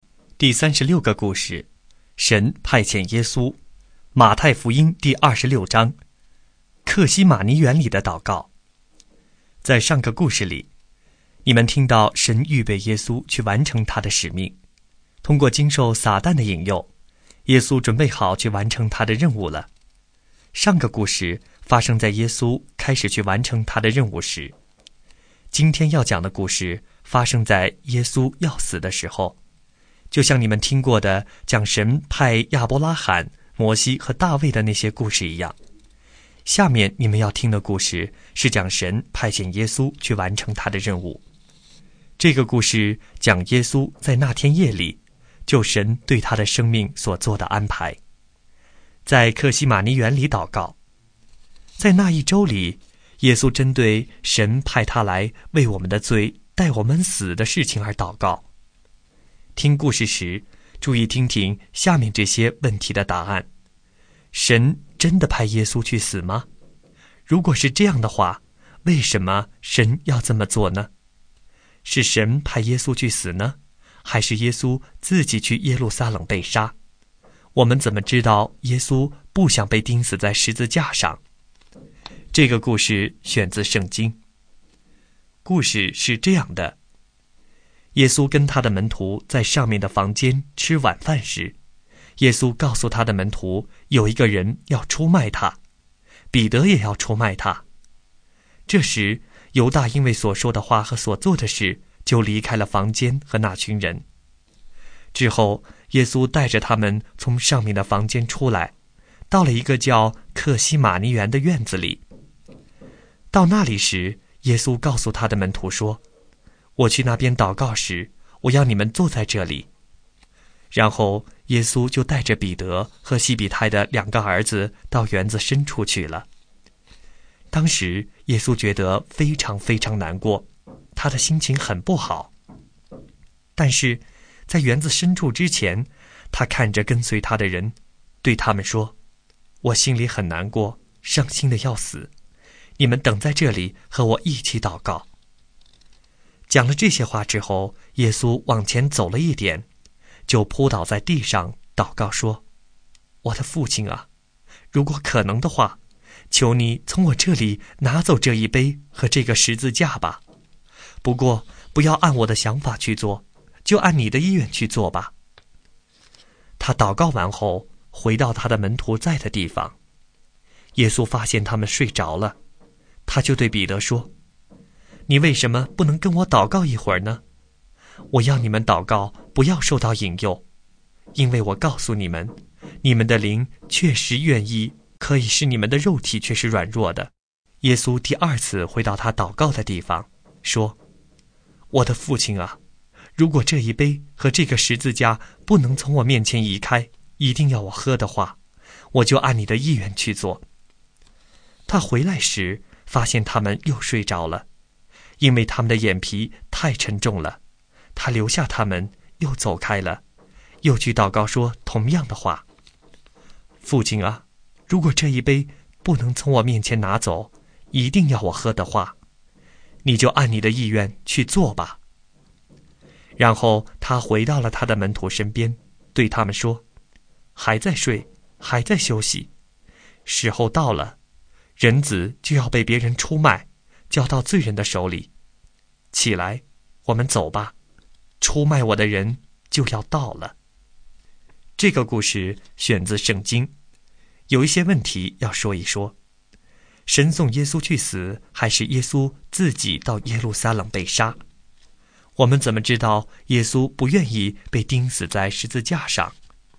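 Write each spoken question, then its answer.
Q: 我们怎么知道耶稣不愿意被钉死在十字架上?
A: 因为他祷告求父亲从他这里拿走这一杯和这个十字架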